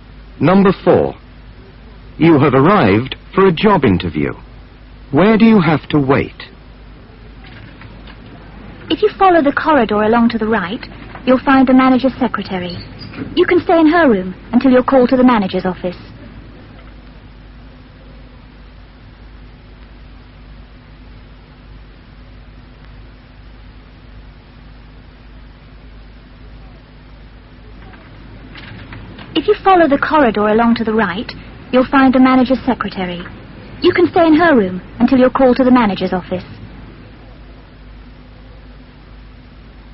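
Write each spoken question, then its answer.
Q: Where do you have to wait?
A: In the manager's secretary's room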